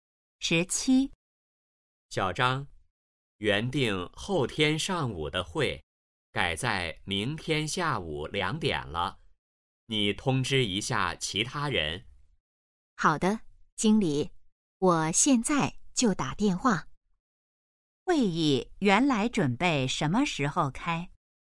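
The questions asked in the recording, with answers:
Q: 会议原来准备什么时候开?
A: 后天上午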